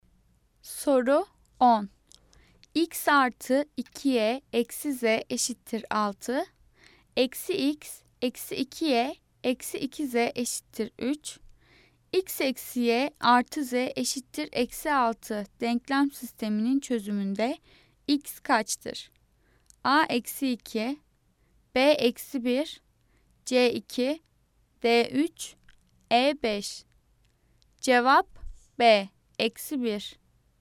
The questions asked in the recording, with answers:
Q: X eksi y artı z eşittir eksi 6 denklem sisteminin çözümünde x kaçtır?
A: Cevap B eksi 1.